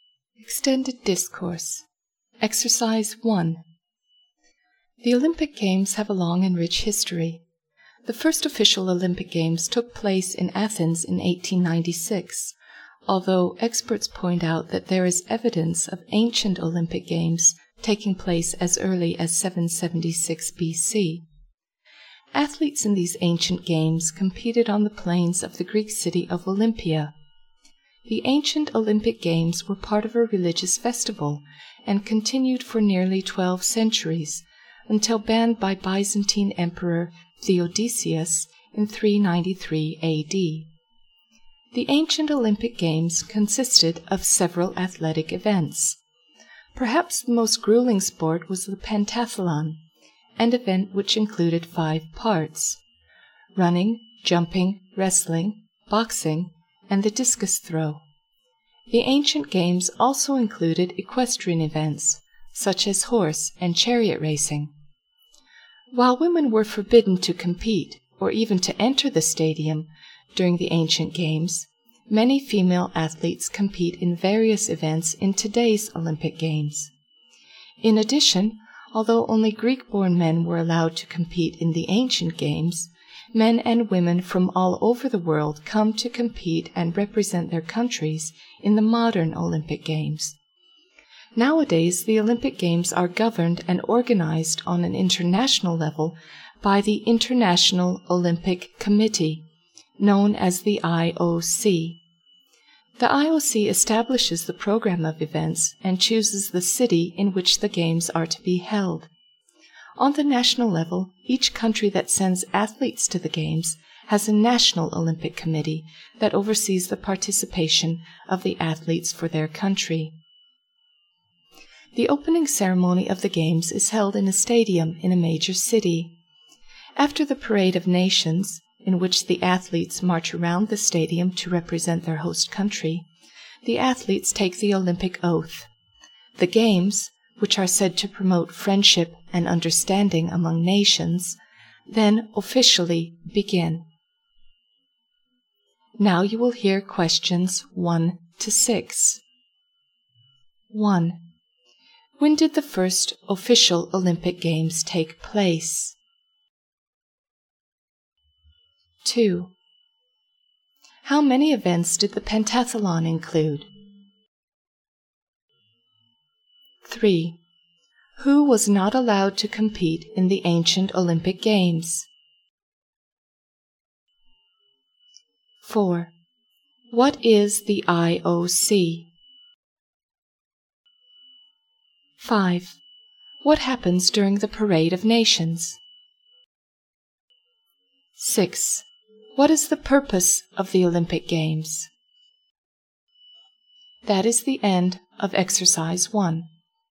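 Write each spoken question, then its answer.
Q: When did the first official Olympic Games take place?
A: In 1896, in Athens

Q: How many events did the pentathlon include?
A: Five

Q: Who was not allowed to compete in the ancient Olympic Games?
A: Women and men not born in Greece

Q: What is the IOC?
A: The International Olympic Committee, which governs and organizes the Games internationally

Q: What happens during the Parade of Nations?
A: The athletes march around the stadium to represent their countries

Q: What is the purpose of the Olympic Games?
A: To promote friendship and understanding among nations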